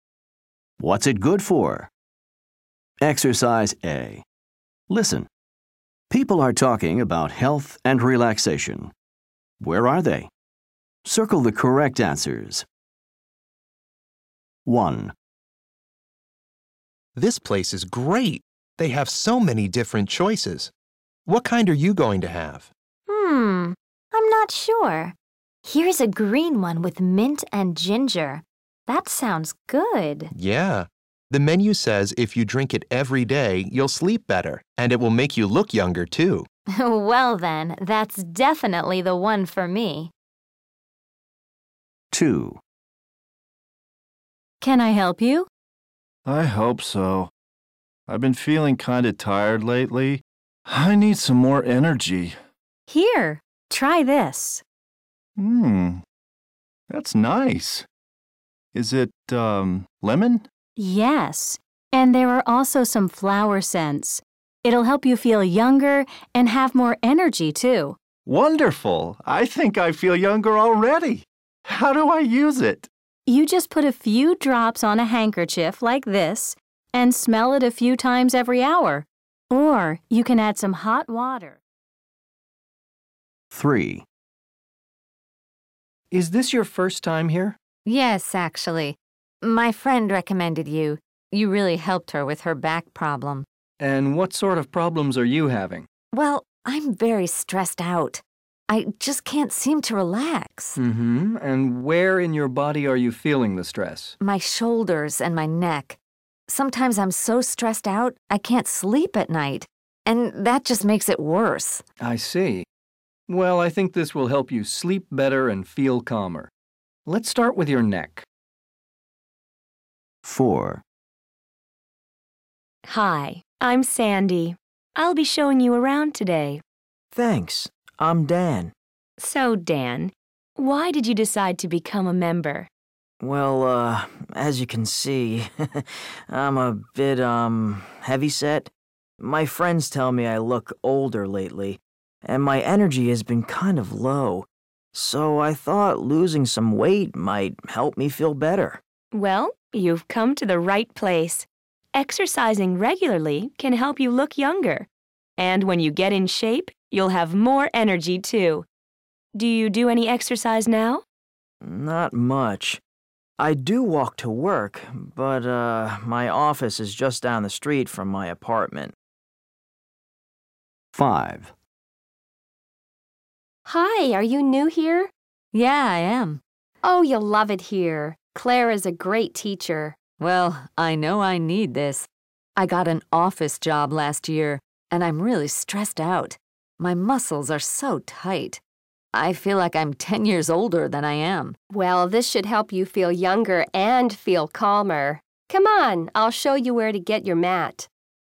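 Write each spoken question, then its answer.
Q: Where are they?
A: At a gym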